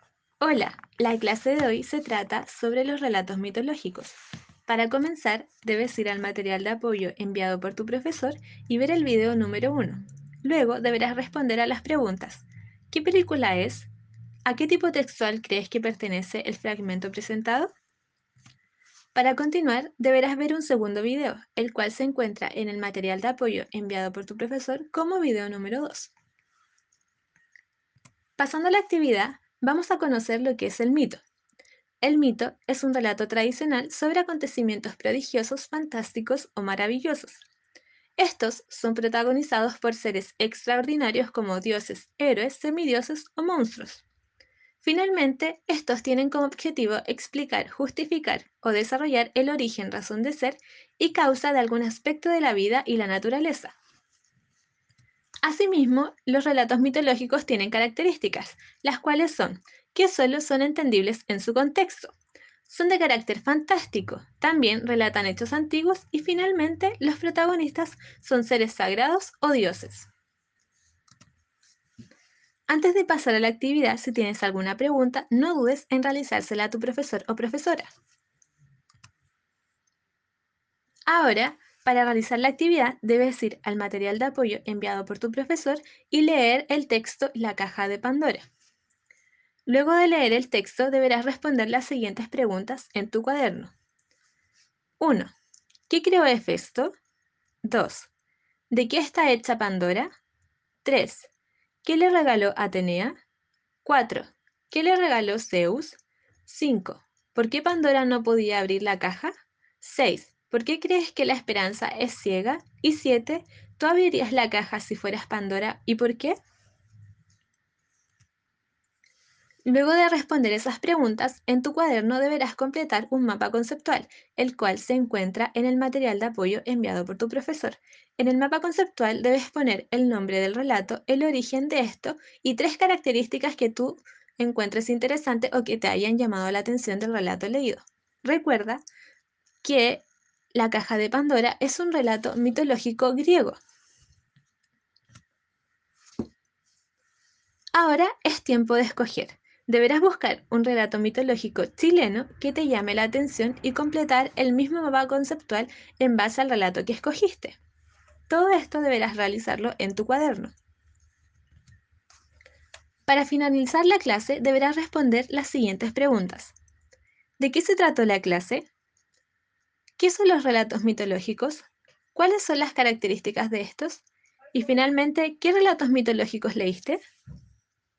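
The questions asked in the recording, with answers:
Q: ¿De qué se trató la clase?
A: Sobre los relatos mitológicos

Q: ¿Qué son los relatos mitológicos?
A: Relatos tradicionales sobre acontecimientos prodigiosos o fantásticos, protagonizados por seres extraordinarios, que explican el origen de algún aspecto de la vida y la naturaleza

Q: ¿Cuáles son las características de estos?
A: Solo son entendibles en su contexto, son de carácter fantástico, relatan hechos antiguos y sus protagonistas son seres sagrados o dioses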